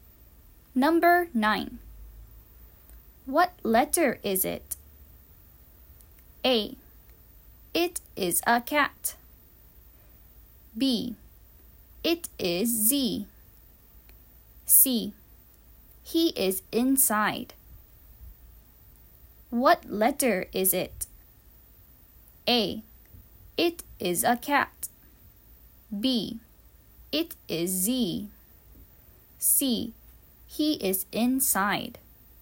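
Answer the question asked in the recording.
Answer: B: It is Z.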